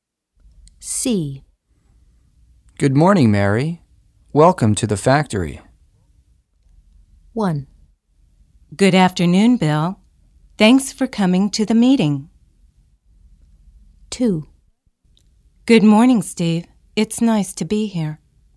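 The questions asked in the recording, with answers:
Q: Good morning, Mary. Welcome to the factory.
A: 2: Good morning, Steve. It's nice to be here.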